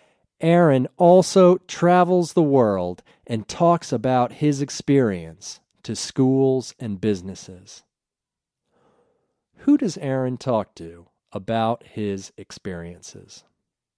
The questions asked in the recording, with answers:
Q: Who does Aaron talk to about his experiences?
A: Aaron talks to schools and businesses about his experiences.